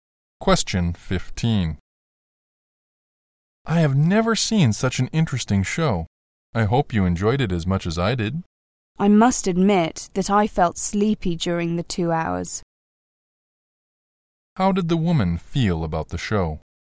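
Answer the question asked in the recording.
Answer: She found it boring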